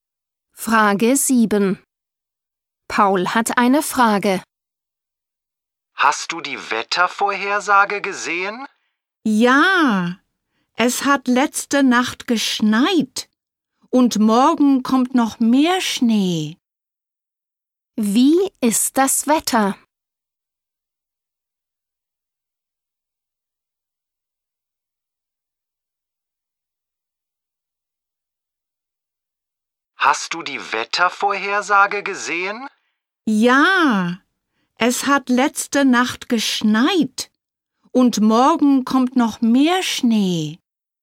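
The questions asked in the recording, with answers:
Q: Wie ist das Wetter?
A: Es schneit (Schnee)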